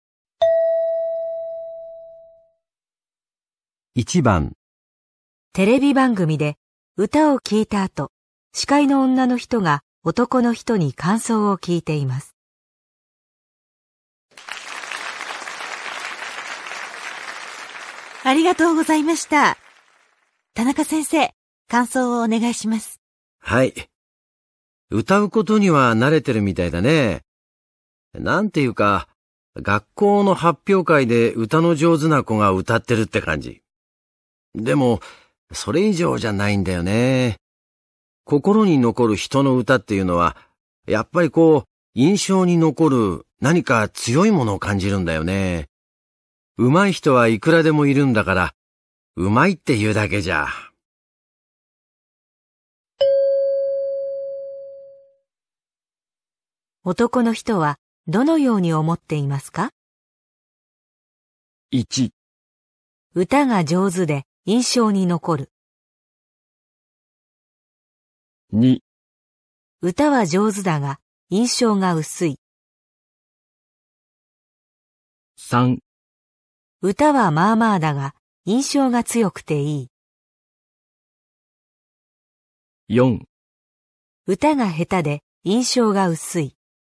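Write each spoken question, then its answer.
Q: 男の人はどのように思っていますか?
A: 2: 歌は上手だが印象が薄い。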